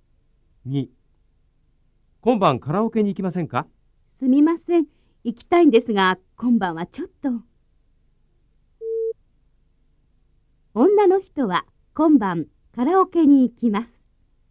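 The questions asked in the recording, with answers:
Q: 女の人は今晩カラオケに行きます。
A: 間違い(×)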